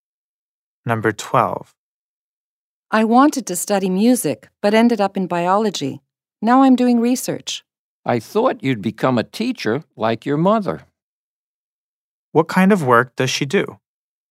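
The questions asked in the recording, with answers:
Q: What kind of work does she do?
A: Research (in biology)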